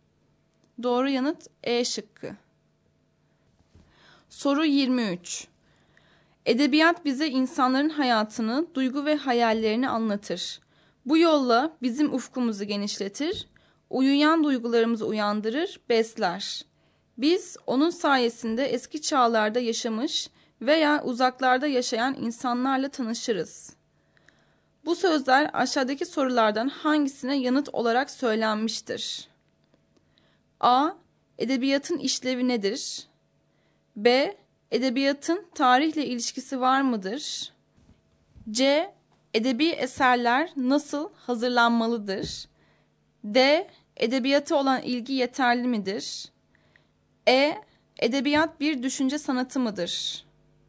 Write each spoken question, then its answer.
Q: Bu sözler aşağıdaki sorulardan hangisine yanıt olarak söylenmiştir?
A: Doğru yanıt A şıkkı.